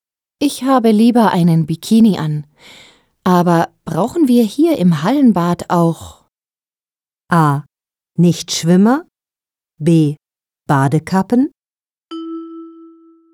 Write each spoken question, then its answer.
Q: Aber brauchen wir hier im Hallenbad auch?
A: B. Aber brauchen wir hier im Hallenbad auch Badekappen?